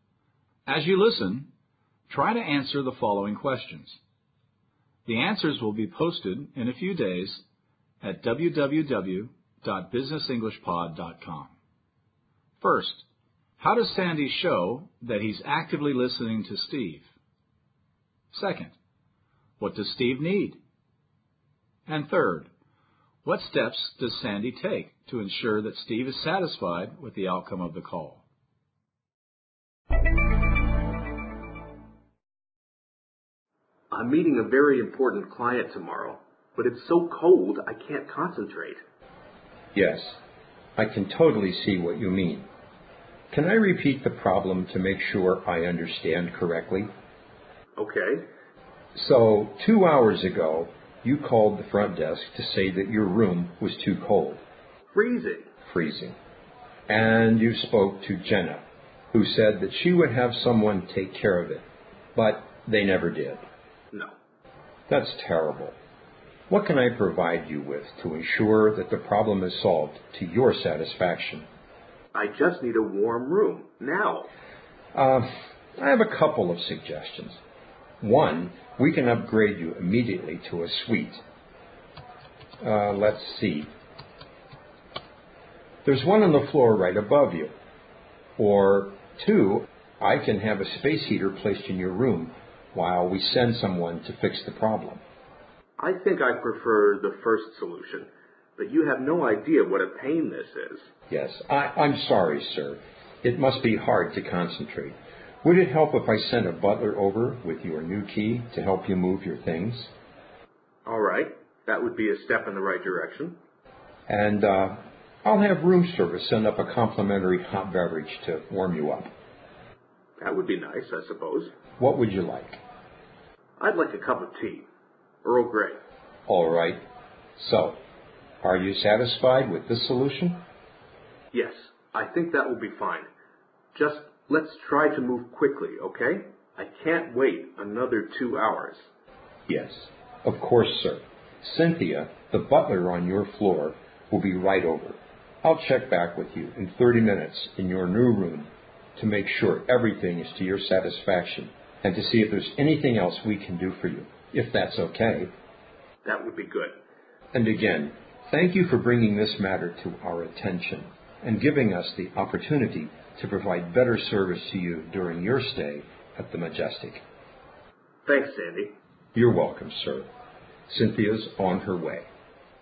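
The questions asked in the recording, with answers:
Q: how does Sandy show that he's actively listening to Steve?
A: He asks, "Can I repeat the problem to make sure I've understood correctly?" This is clarifying the problem.

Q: what does Steve need?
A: A warm room, right away.

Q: what steps does Sandy take to ensure that Steve is satisfied with the outcome of the call?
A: He asks Steve if he is satisfied with the solution and says he will check back in 30 minutes.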